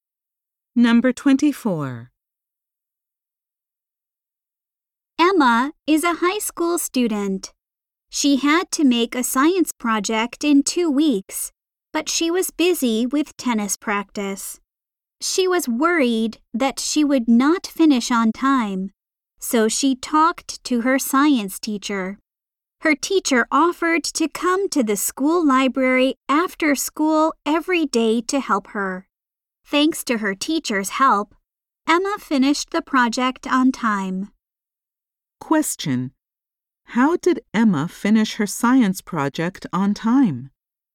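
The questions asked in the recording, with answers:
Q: How did Emma finish her science project on time?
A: Her teacher helped her in the library after school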